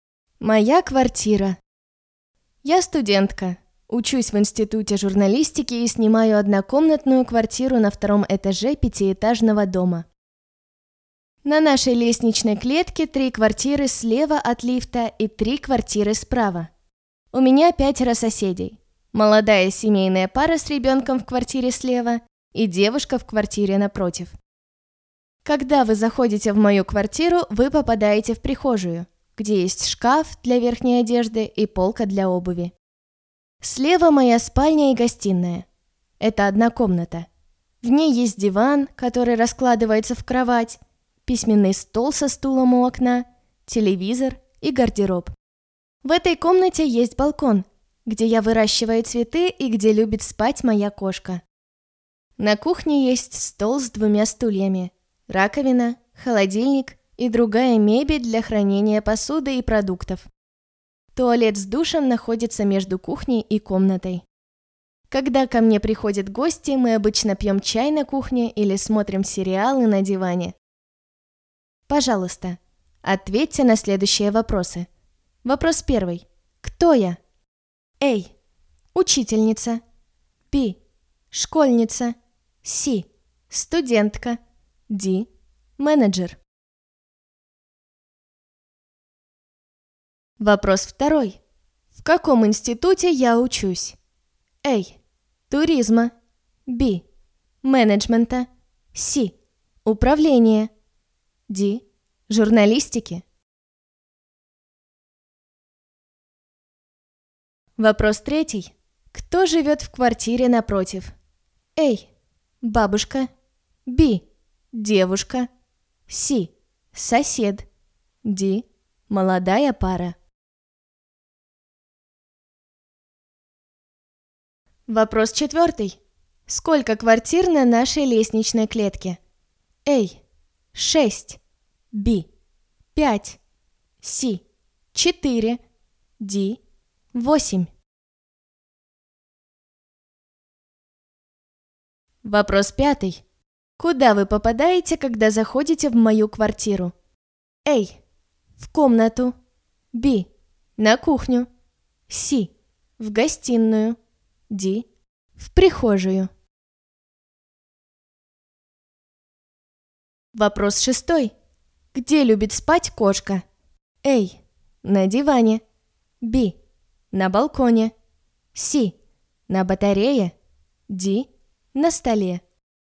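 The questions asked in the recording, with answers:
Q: Кто я?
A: C: Студентка

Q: В каком институте я учусь?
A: D: Журналистики

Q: Кто живет в квартире напротив?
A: B: Девушка

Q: Сколько квартир на нашей лестничной клетке?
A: A: 6

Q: Куда вы попадаете, когда заходите в мою квартиру?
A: D: В прихожую

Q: Где любит спать кошка?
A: B: На балконе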